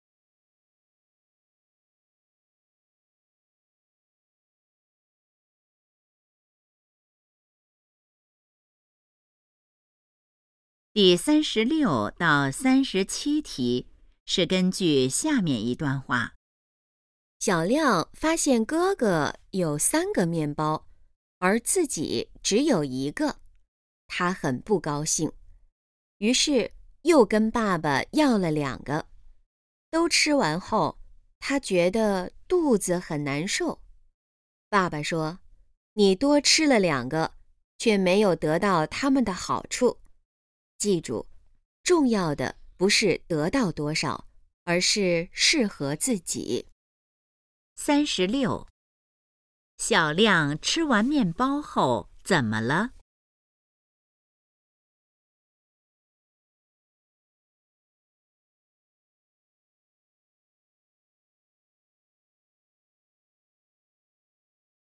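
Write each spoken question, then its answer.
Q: 小亮吃完面包后怎么了?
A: 肚子很难受

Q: 根据这段话,什么才是最重要的?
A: 适合自己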